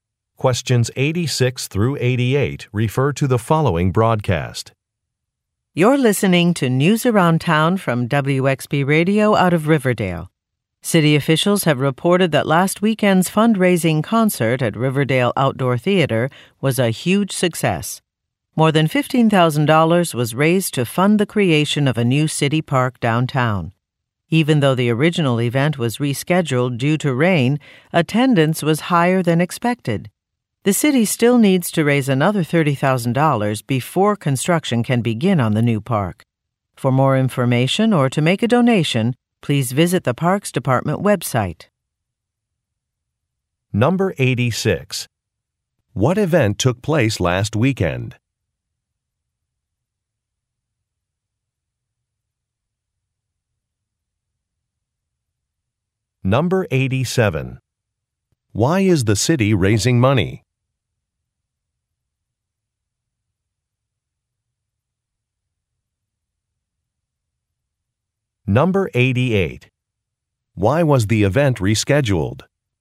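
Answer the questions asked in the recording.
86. A fundraising concert
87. To build a new city park
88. Because of rain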